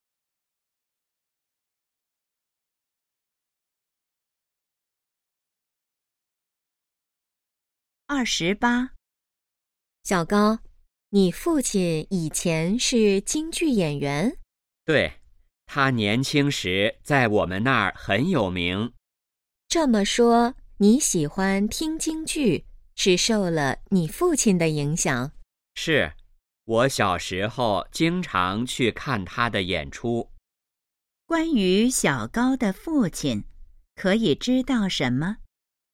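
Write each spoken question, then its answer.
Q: 关于小高的父亲,可以知道什么?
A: 以前是京剧演员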